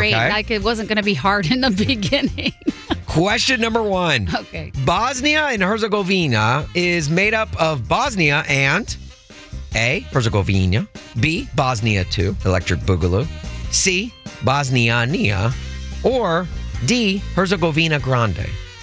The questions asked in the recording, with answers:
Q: Bosnia and Herzegovina is made up of Bosnia and A, Herzegovina, B, Bosnia 2, Electric Boogaloo, C, Bosniania, or D, Herzegovina Grande.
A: Is it Herzegovina? Correct.